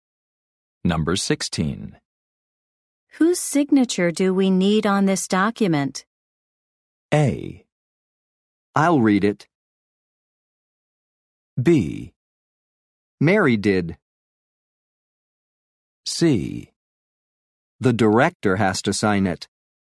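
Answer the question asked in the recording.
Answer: C: The director has to sign it.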